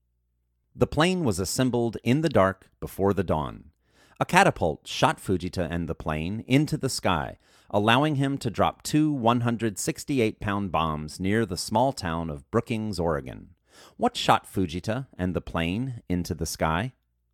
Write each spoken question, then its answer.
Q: What shot Fujita and the plane into the sky?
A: A catapult shot Fujita and the plane into the sky.